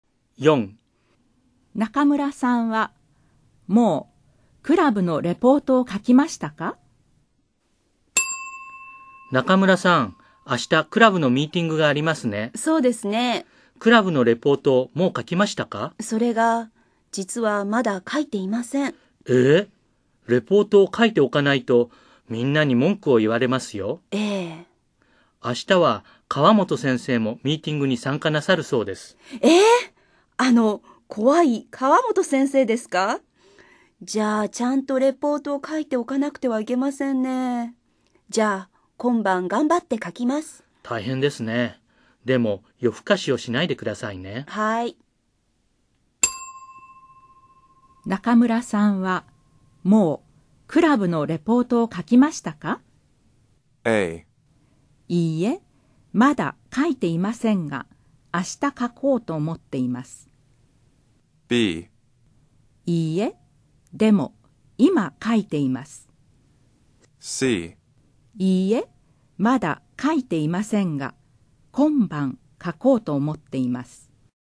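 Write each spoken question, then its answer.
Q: 中村さんはもうクラブのレポートを書きましたか?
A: C: いいえ、まだ書いていませんが今晩書こうと思っています。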